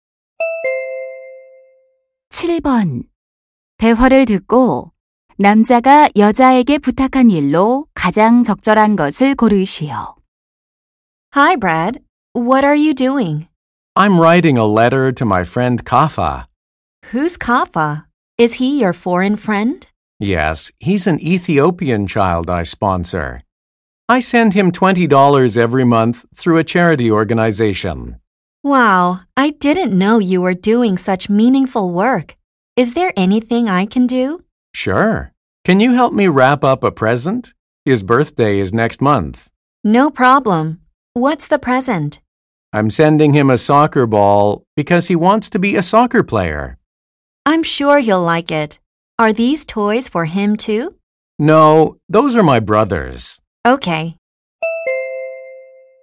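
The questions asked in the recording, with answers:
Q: 대화를 듣고 남자가 여자에게 부탁한 일로 가장 적절한 것을 고르시오.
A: 선물 포장 도와주기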